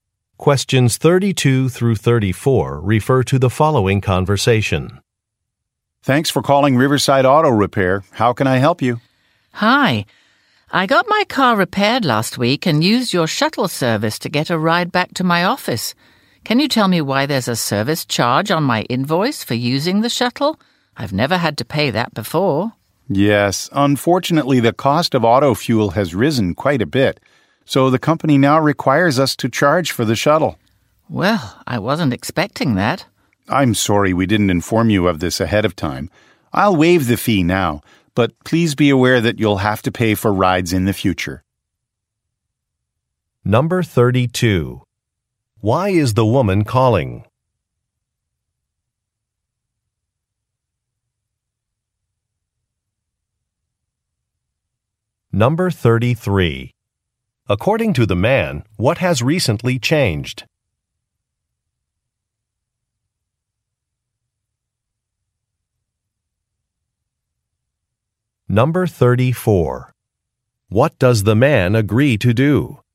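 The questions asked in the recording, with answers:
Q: Why is the woman calling?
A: To ask about a shuttle service charge on her invoice

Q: According to the man, what has recently changed?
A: The cost of auto fuel has risen, so the shuttle now has a charge

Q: What does the man agree to do?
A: Waive the shuttle fee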